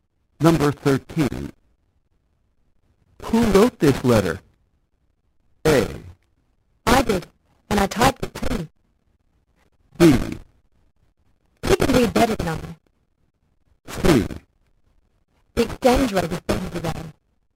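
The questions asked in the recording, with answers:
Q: Who wrote this letter?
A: A: I did, and I typed it too.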